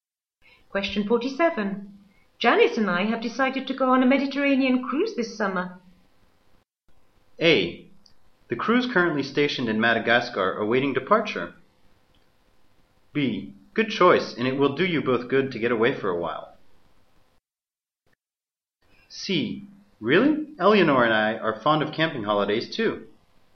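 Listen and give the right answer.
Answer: B: Good choice, and it will do you both good to get away for a while.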